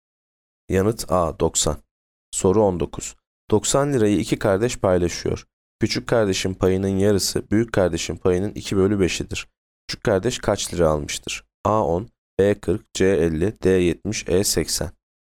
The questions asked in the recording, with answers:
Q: Küçük kardeş kaç lira almıştır?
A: Yanıt B 40.